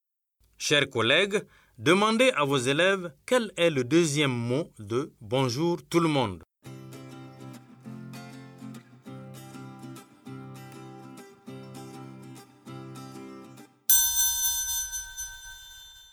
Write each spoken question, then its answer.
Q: Chers collègues, demandez à vos élèves quel est le deuxième mot de bonjour tout le monde.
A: J'espère que vos élèves ont dit tout.